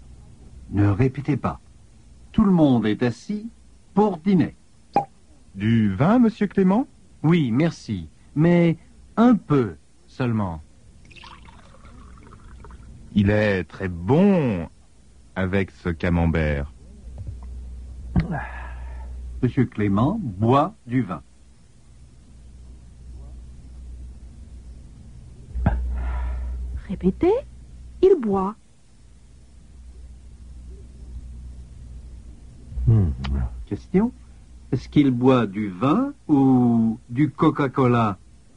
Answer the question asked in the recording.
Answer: Il boit du vin.